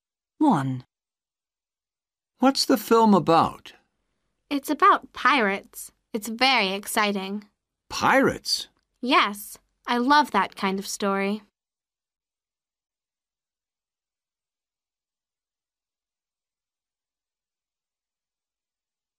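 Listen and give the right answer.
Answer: pirates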